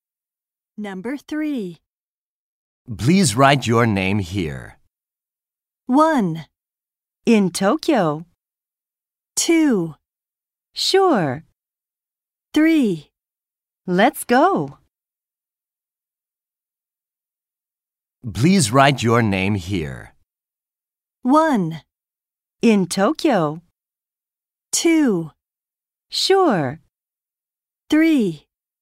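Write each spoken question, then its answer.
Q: Please write your name here.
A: 2: Sure.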